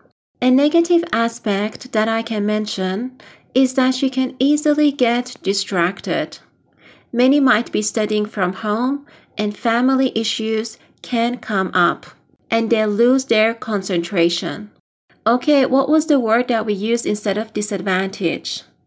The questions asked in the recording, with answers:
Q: Okay, what was the word that we used instead of disadvantage?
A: Yes, you are right. Negative aspect.